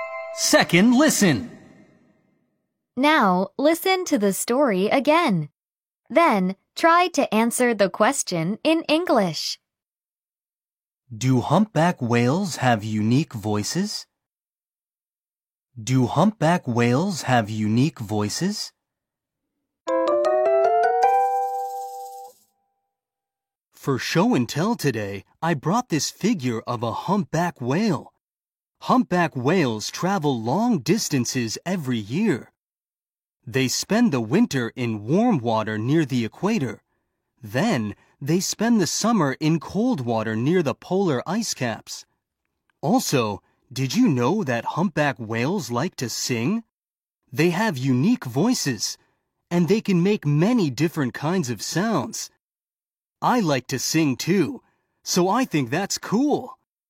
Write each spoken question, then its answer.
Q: Do humpback whales have unique voices?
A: The answer is, yes, they do.